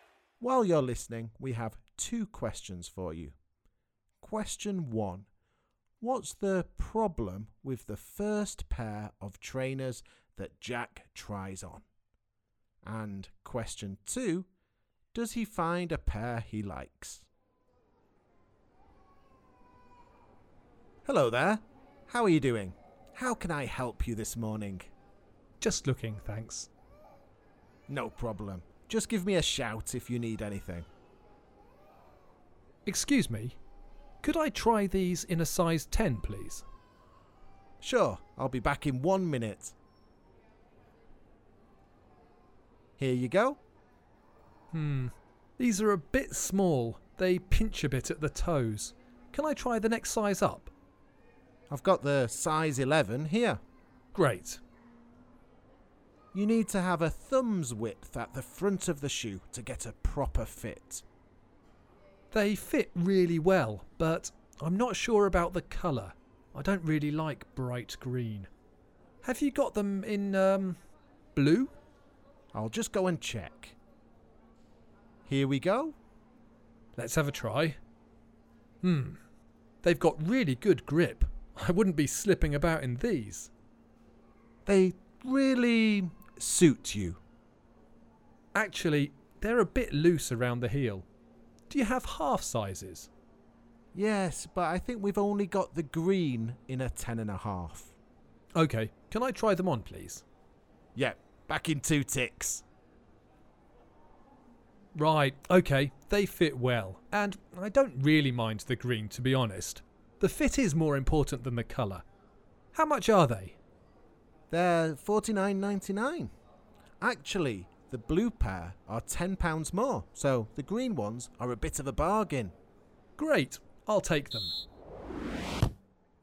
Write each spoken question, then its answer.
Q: What's the problem with the first pair of trainers that Jack tries on?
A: Jack said the first pair of trainers pinched at the toes.